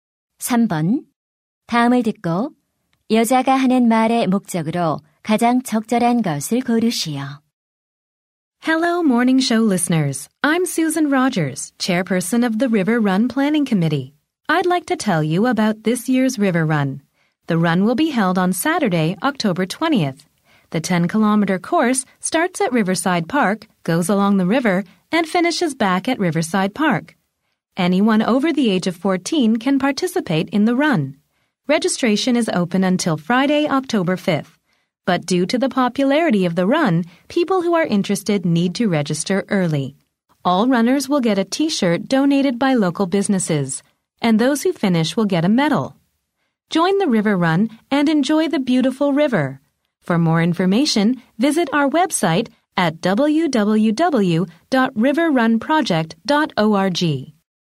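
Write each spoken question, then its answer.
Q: 다음을 듣고 여자가 하는 말의 목적으로 가장 적절한 것을 고르시오.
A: 리버 런 대회를 안내하고 참가를 독려하려고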